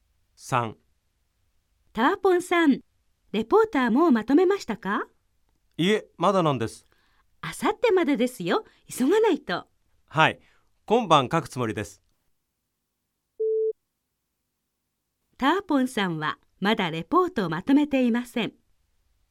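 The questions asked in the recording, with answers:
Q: ターポンさんはまだレポートをまとめていません。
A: ○(正しい)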